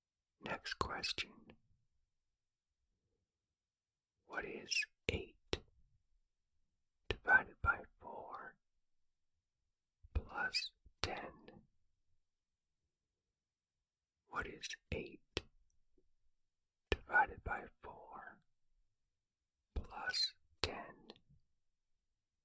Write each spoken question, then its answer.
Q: What is 8 divided by 4 plus 10?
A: The answer is 12.